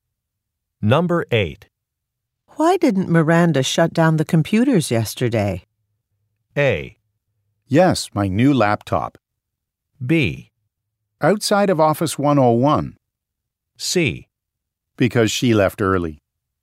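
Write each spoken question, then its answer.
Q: Why didn't Miranda shut down the computers yesterday?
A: C: Because she left early.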